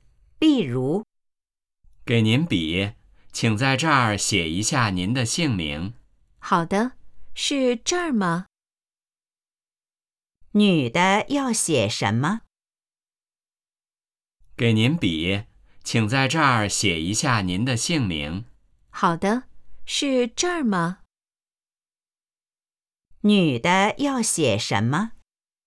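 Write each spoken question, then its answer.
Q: 女的要写什么?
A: 姓名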